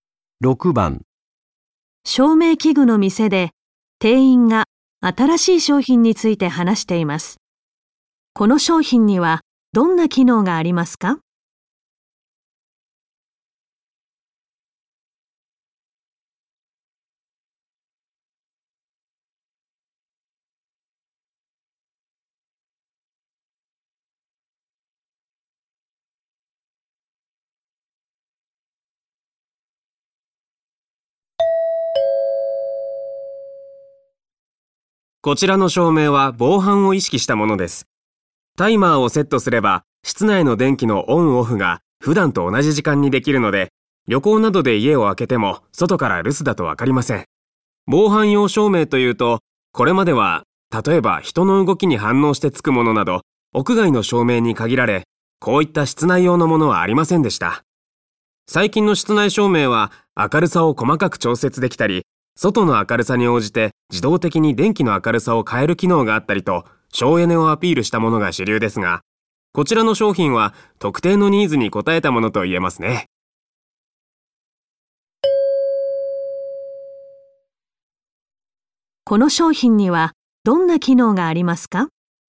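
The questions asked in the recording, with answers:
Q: この商品にはどんな機能がありますか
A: タイマーで室内の電気を普段と同じ時間につけたり消したりできる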